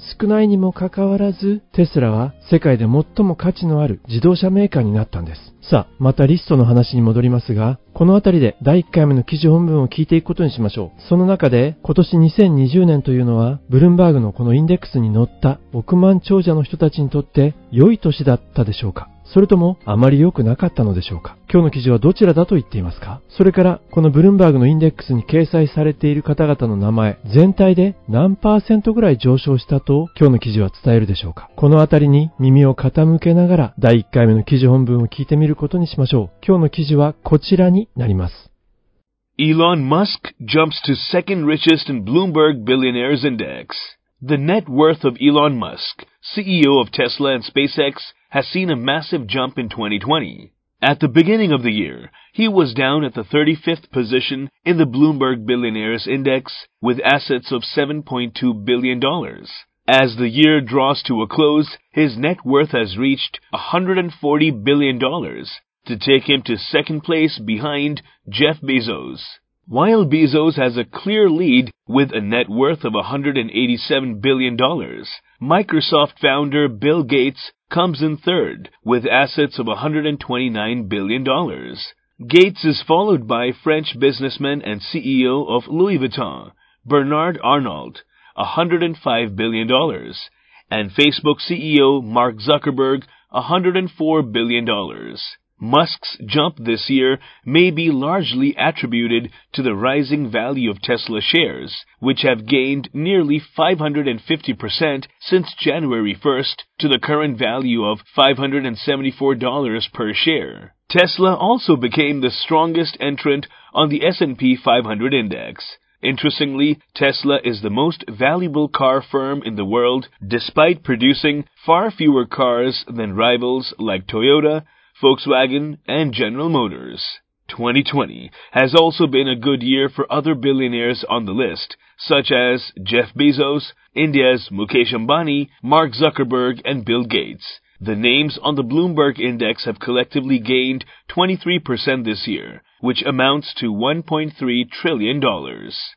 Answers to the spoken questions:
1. とても良い年になったようです。
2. 最後の箇所が耳に残りましたね。23% this year.